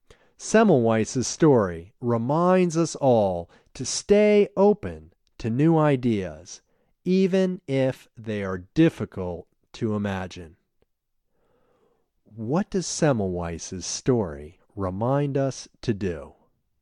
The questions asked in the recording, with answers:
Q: What does Semmelweis's story remind us to do?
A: Semmelweis's story reminds us all to stay open to new ideas, even if they are difficult to imagine.